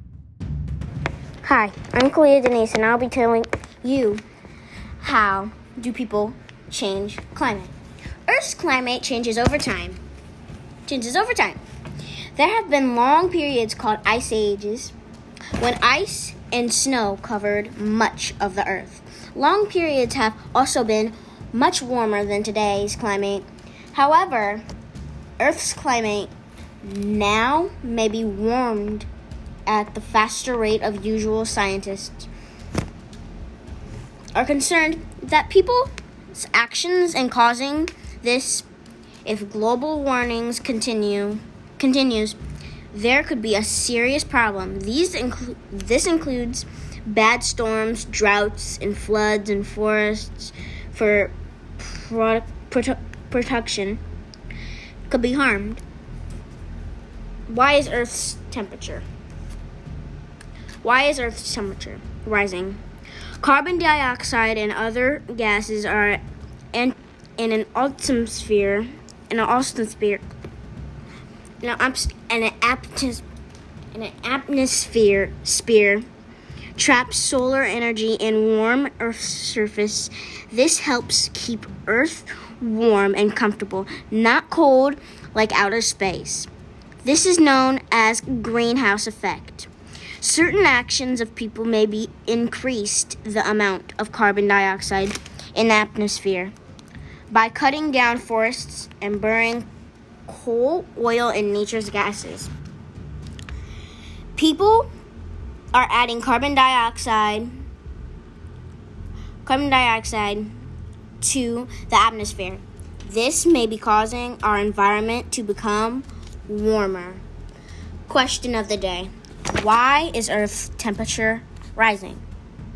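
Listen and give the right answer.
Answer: People are adding carbon dioxide to the atmosphere (by cutting down forests and burning coal, oil and natural gas), which traps solar energy.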